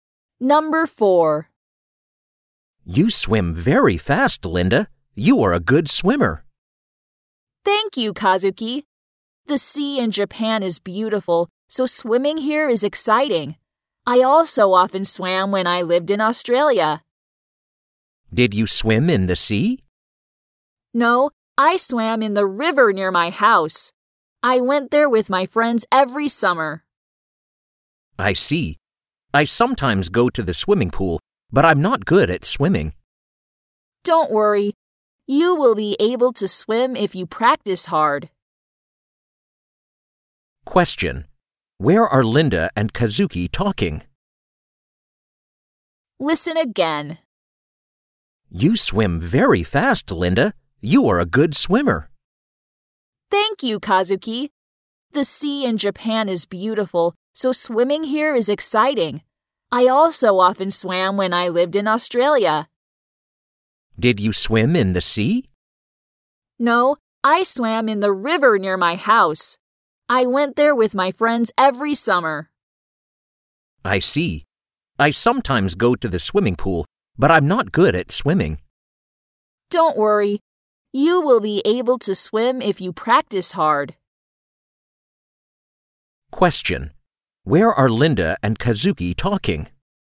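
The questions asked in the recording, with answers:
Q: Where are Linda and Kazuki talking?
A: At the sea in Japan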